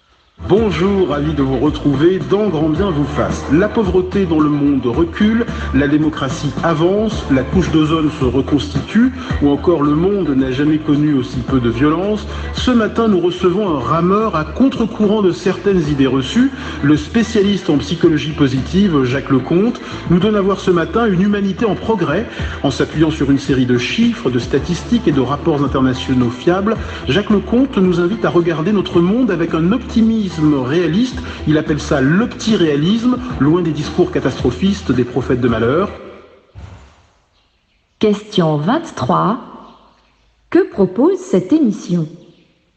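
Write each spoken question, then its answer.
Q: Que propose cette émission ?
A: Un regard optimiste et réaliste (l'opti-réalisme) sur une humanité en progrès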